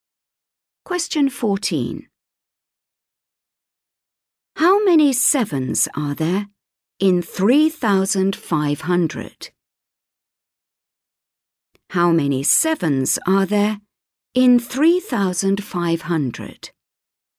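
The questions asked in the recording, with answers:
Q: How many sevens are there in 3,500?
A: 500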